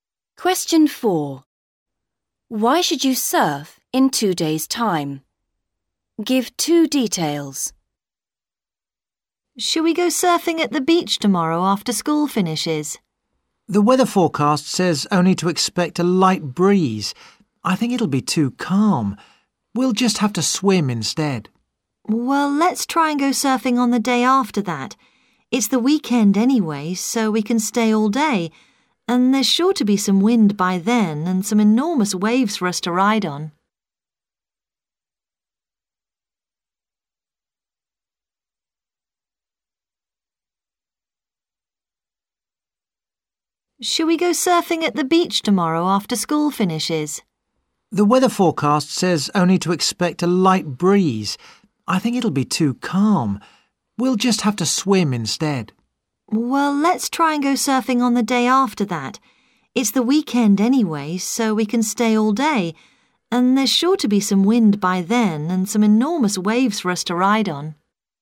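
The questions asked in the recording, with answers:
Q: Why should you surf in 2 days' time?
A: There will be wind and enormous waves; it's the weekend so you can stay all day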